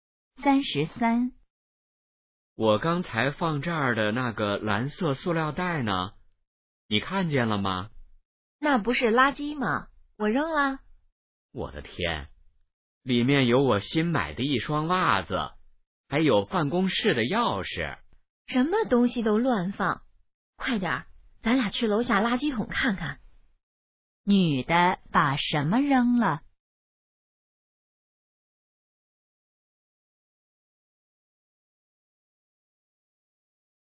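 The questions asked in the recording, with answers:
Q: 女的把什么扔了?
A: 一个蓝色塑料袋(里面有袜子和钥匙)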